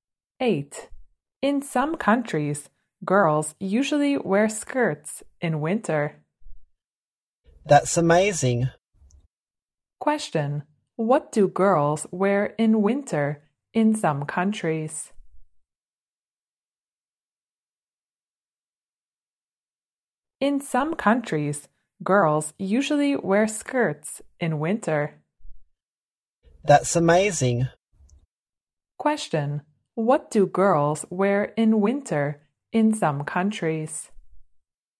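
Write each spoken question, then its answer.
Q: What do girls wear in winter in some countries?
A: Skirts.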